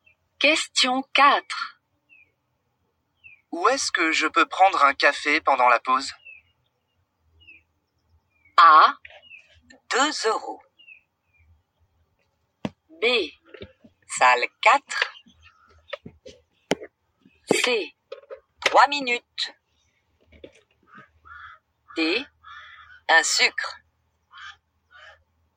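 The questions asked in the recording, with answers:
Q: Où est-ce que je peux prendre un café pendant la pause?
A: B: Salle 4.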